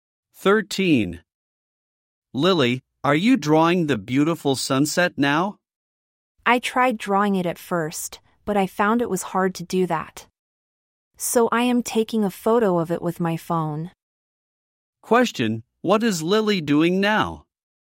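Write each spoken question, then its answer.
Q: Question: what is Lily doing now?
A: Taking a photo of the sunset with her phone.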